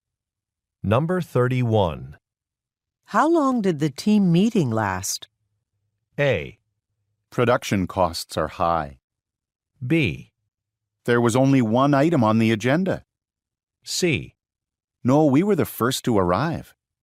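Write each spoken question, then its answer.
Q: How long did the team meeting last?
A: B: There was only one item on the agenda.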